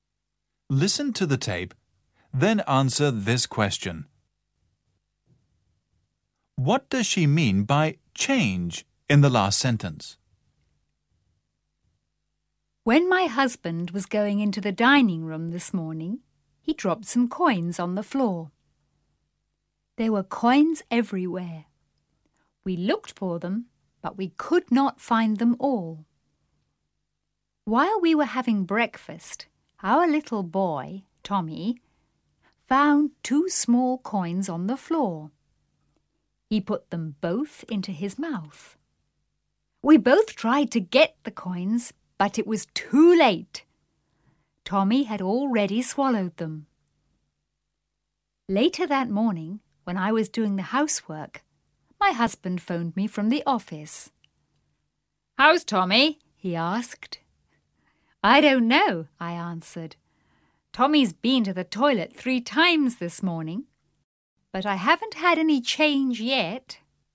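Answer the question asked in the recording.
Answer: The coins (money) Tommy swallowed; they haven't come out yet (a pun on change meaning coins)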